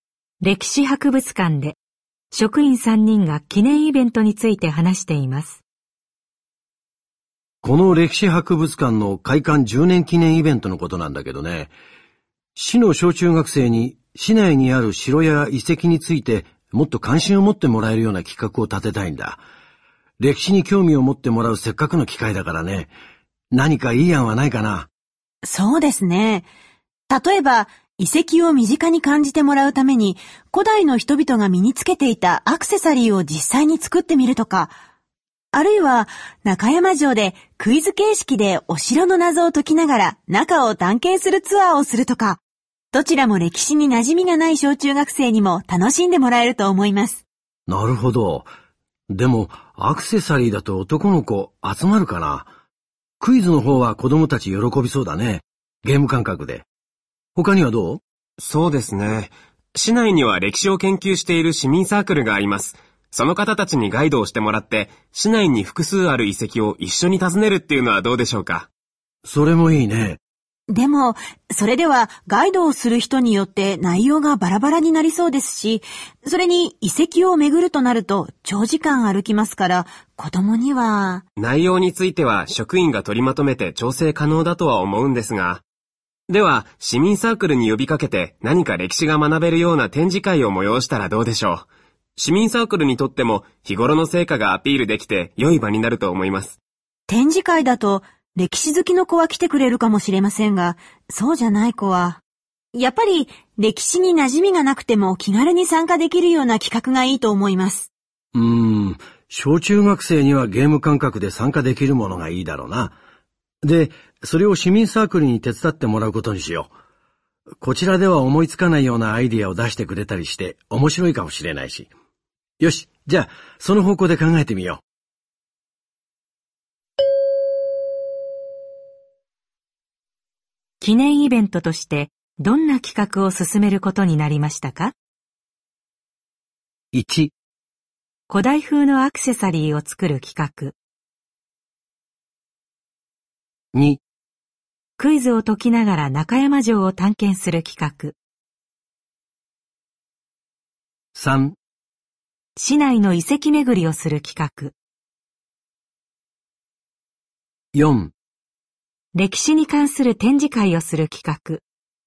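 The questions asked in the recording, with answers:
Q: 記念イベントとしてどんな企画を進めることになりましたか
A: 2: クイズを解きながら中山城を探検する企画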